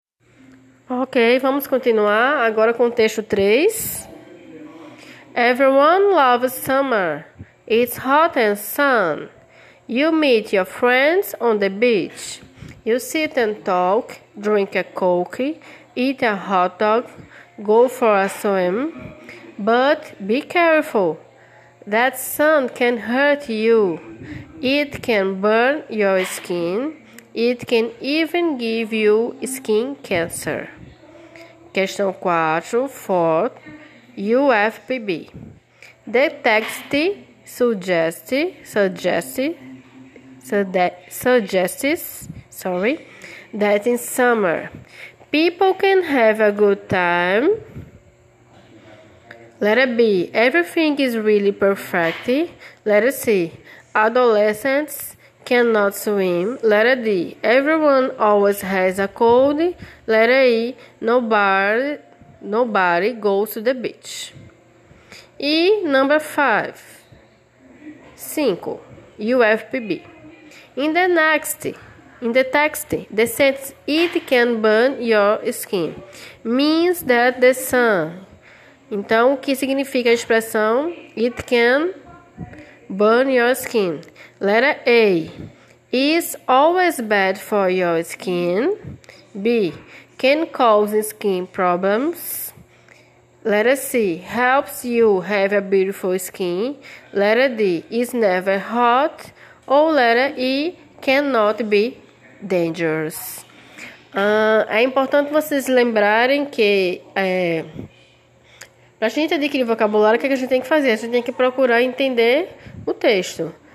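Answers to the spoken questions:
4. A: in summer, people can have a good time
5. B: Can cause skin problems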